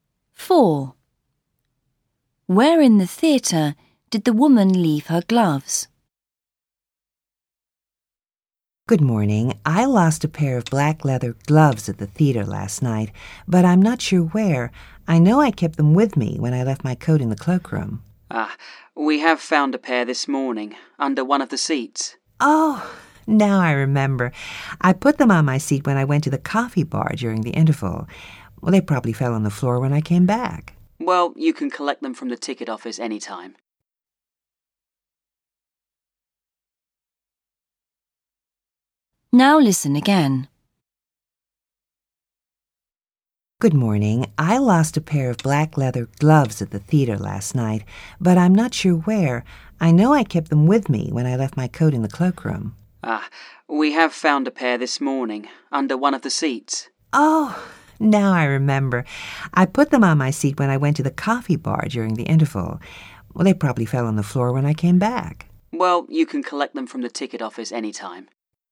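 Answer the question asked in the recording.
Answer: On her seat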